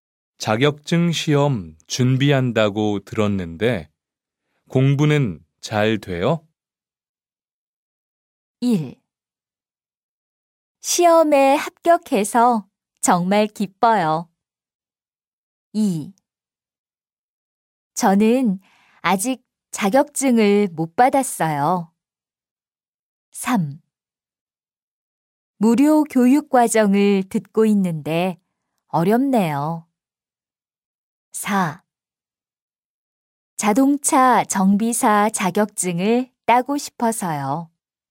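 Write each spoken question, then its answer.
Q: 자격증 시험 준비한다고 들었는데 공부는 잘 돼요?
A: 3: 무료 교육 과정을 듣고 있는데 어렵네요.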